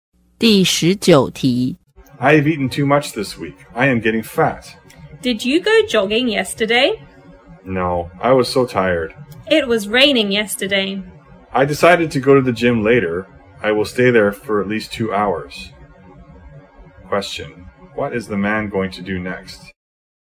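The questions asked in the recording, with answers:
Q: what is the man going to do next?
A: Go to the gym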